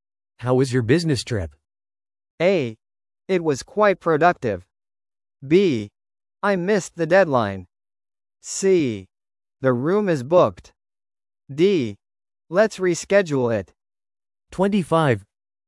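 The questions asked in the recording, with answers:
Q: How was your business trip?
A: A: It was quite productive.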